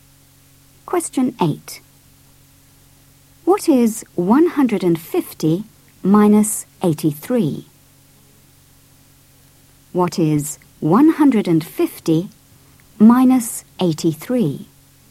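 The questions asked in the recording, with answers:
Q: What is 150 minus 83?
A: 67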